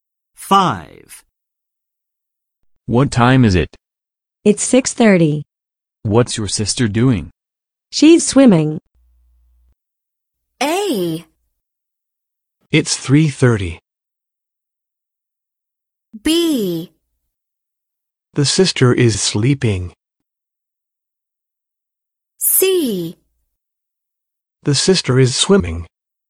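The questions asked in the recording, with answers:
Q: What's your sister doing?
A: C: The sister is swimming.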